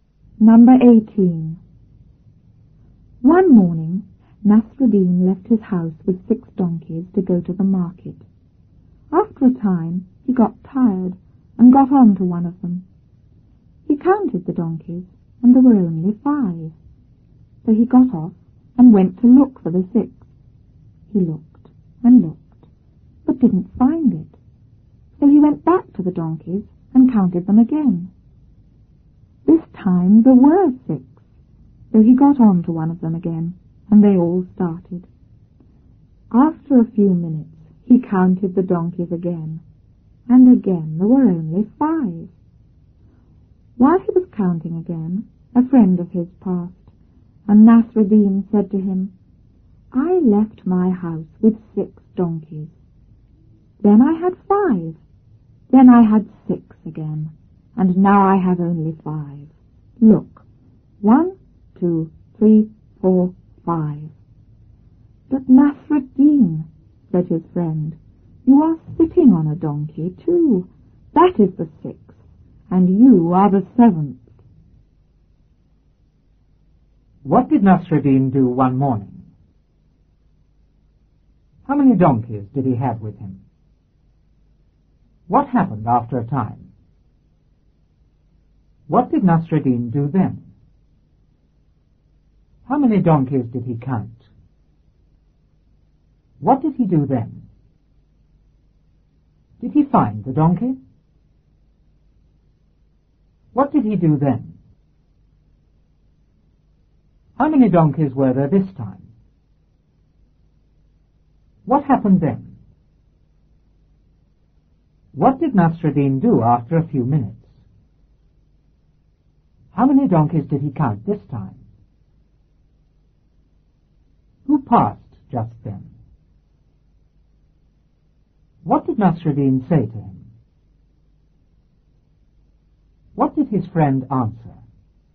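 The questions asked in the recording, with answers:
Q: What did Nasruddin do one morning?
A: He left his house with 6 donkeys to go to the market.

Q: How many donkeys did he have with him?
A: Six

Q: What happened after a time?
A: He got tired and got on to one of them.

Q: What did Nasruddin do then?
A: He counted the donkeys.

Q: How many donkeys did he count?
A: Five

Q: What did he do then?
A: He got off and went to look for the sixth.

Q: Did he find the donkey?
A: No

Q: What did he do then?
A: He went back to the donkeys and counted them again.

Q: How many donkeys were there this time?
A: Six

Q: What happened then?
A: He got on to one of them again and they all started.

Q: What did Nasruddin do after a few minutes?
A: He counted the donkeys again.

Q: How many donkeys did he count this time?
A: Five

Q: Who passed just then?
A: A friend of his

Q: What did Nasruddin say to him?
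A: I left my house with 6 donkeys, then I had 5, then 6 again, and now only 5.

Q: What did his friend answer?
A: You are sitting on a donkey too; that is the 6th, and you are the 7th.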